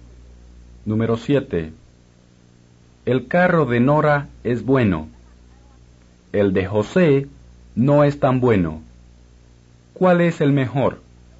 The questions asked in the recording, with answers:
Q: ¿Cuál es el mejor?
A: El carro de Nora, o el de Nora, es el mejor.